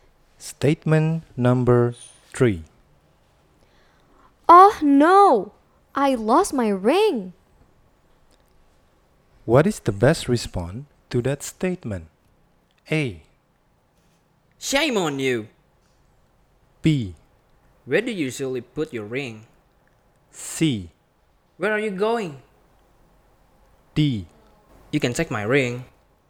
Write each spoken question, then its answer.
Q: What is the best response to that statement?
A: Jawabannya B.